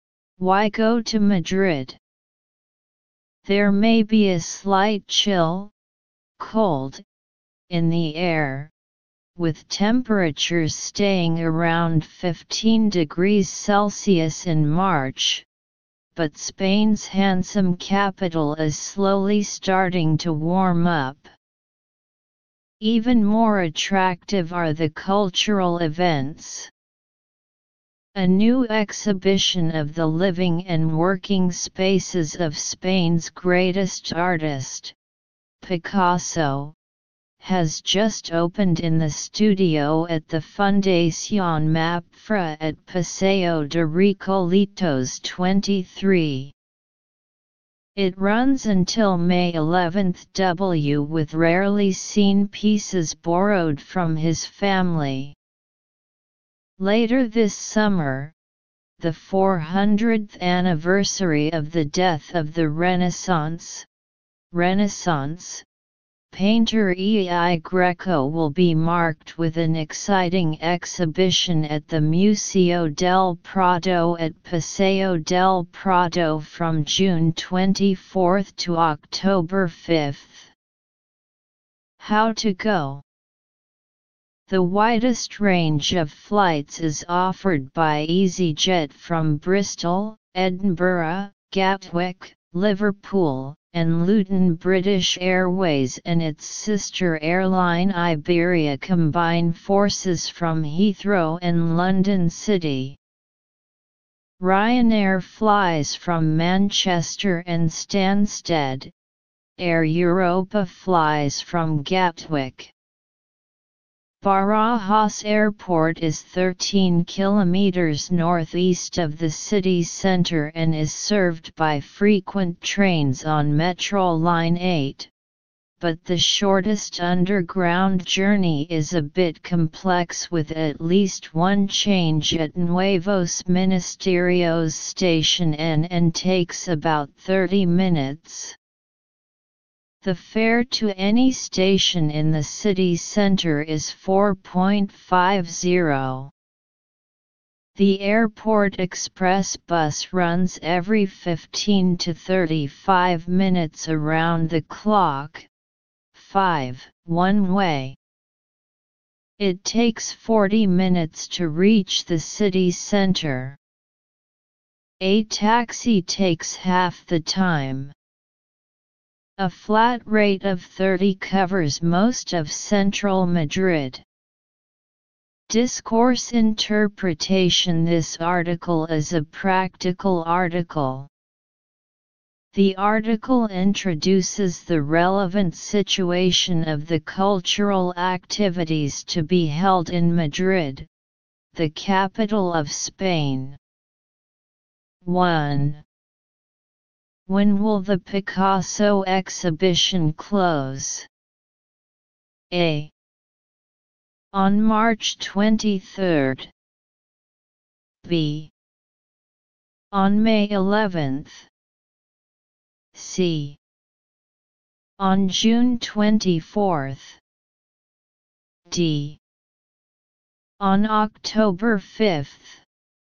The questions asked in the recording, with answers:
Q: When will the Picasso exhibition close?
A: It can be seen that the answer is item B.